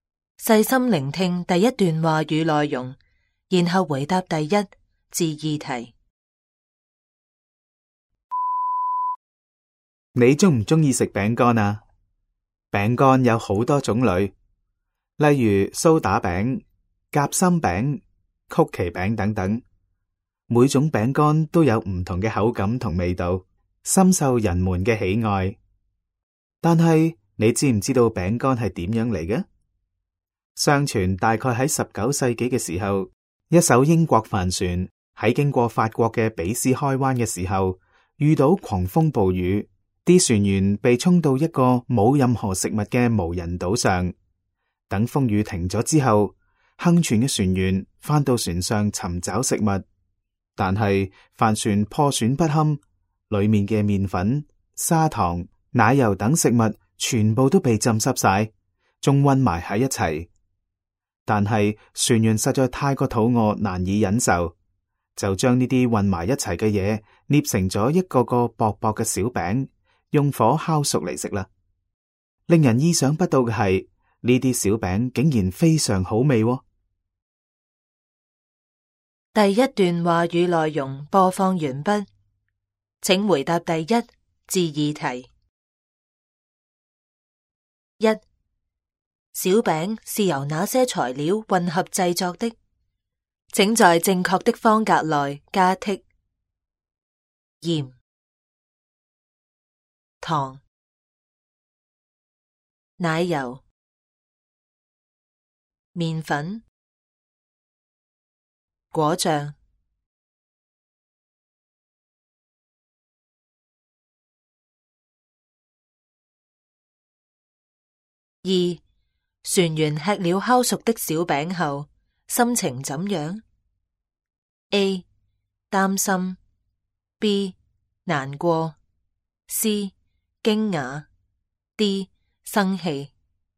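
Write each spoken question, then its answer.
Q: 小饼是由哪些材料混合制作的?请在正确的方格内加剔盐、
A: 糖、奶油、面粉

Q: 船员吃了烤熟的小饼后心情怎样? A 担心, B 难过, C 惊讶, D 生气。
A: C: 惊讶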